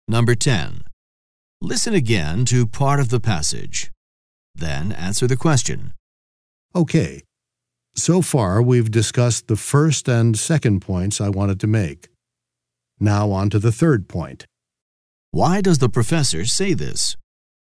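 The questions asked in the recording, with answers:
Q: Why does the professor say this?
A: To signal that he is moving on to his third point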